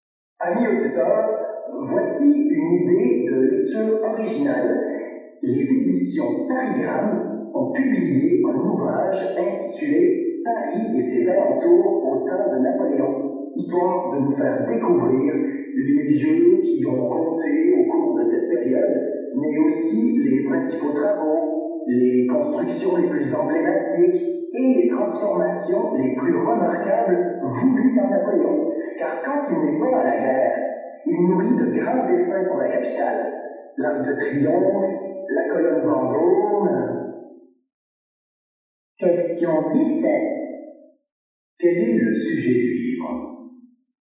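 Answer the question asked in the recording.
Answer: Paris et ses alentours au temps de Napoléon : les travaux, constructions et transformations voulus par Napoléon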